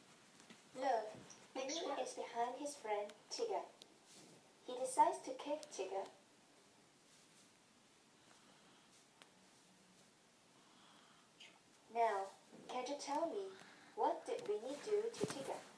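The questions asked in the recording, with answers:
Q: Now, can you tell me, what did Winnie do to Tigger?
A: He kicked Tigger.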